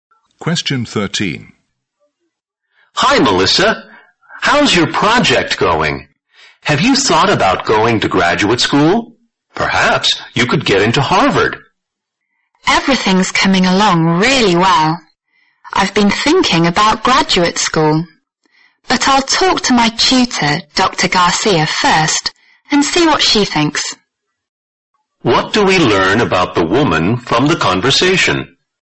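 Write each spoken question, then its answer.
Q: What do we learn about the woman from the conversation?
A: She will ask her tutor's advice about graduate school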